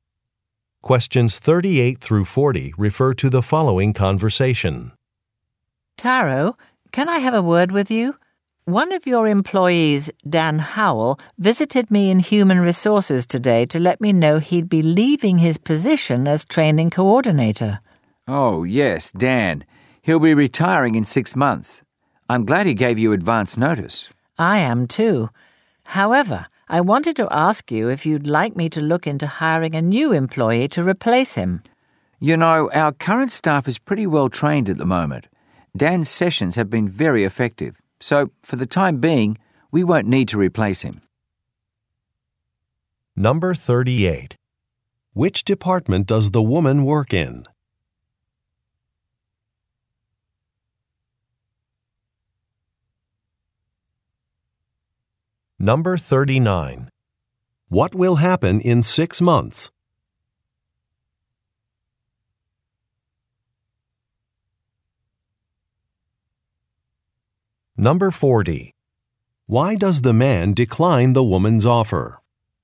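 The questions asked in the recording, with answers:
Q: Which department does the woman work in?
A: Human Resources

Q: What will happen in 6 months?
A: An employee (Dan Howell) will retire

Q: Why does the man decline the woman's offer?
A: The current staff is already well trained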